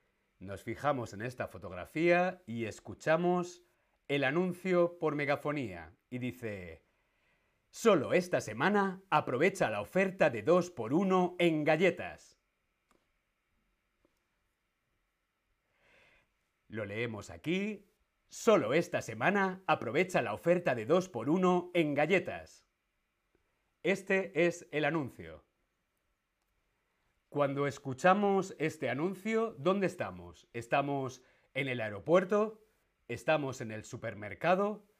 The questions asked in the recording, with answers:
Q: Cuando escuchamos este anuncio, ¿dónde estamos?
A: Correcto, estamos en el supermercado.